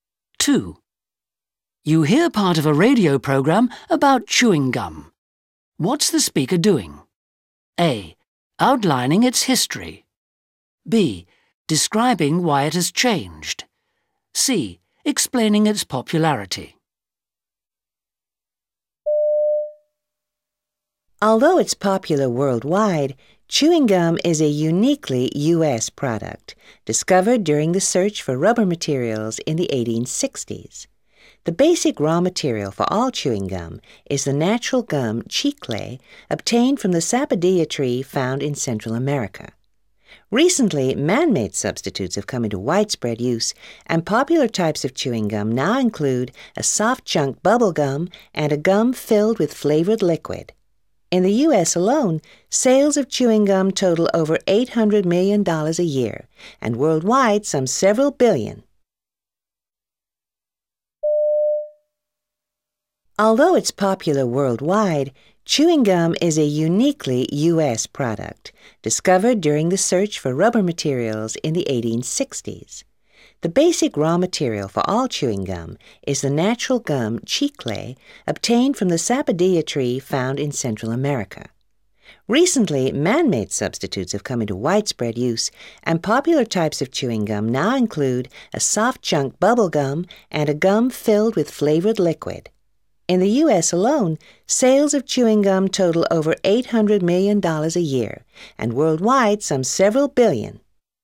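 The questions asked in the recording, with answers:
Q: What's the speaker doing?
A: A: Outlining its history.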